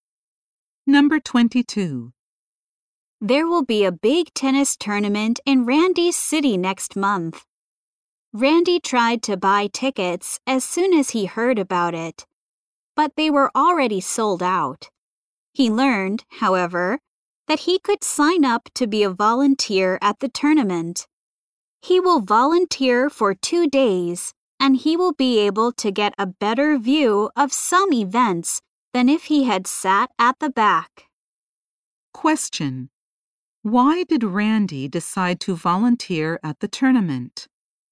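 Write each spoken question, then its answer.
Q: why did Randy decide to volunteer at the tournament?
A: The tickets were already sold out.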